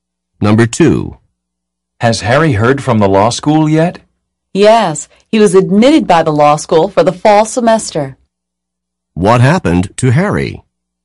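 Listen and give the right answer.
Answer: He was admitted to law school for the fall semester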